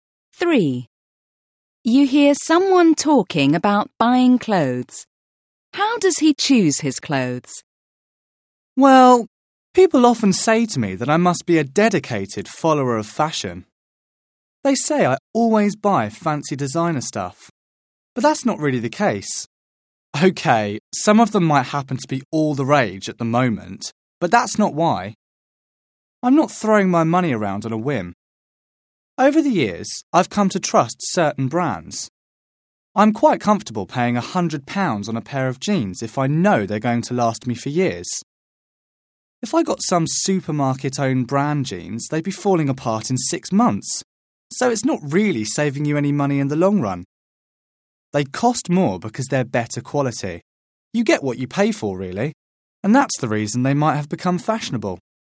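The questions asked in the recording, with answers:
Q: How does he choose his clothes?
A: He buys brands he trusts for quality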